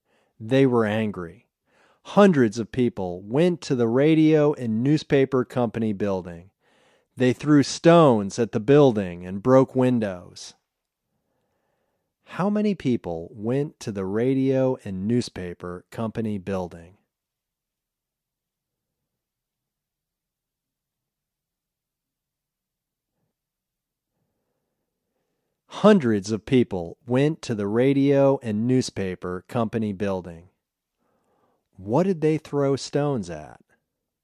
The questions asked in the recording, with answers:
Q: How many people went to the radio and newspaper company building?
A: Hundreds of people went to the radio and newspaper company building.

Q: What did they throw stones at?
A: They threw stones at the building.